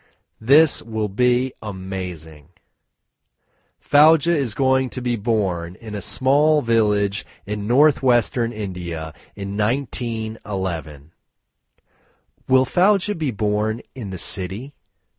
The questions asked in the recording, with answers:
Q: Will Fauja be born in the city?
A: No, Fauja won't be born in the city.